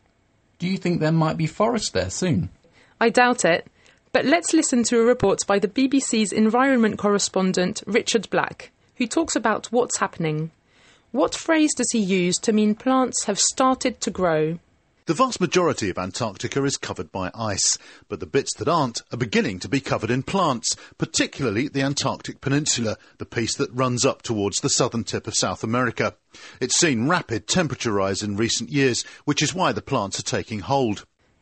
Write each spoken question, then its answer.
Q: What phrase does he use to mean plants have started to grow?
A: there are plants starting to grow, or taking hold.